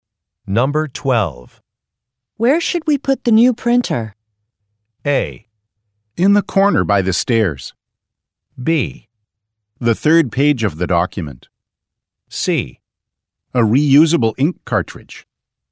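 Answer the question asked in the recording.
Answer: A: In the corner by the stairs.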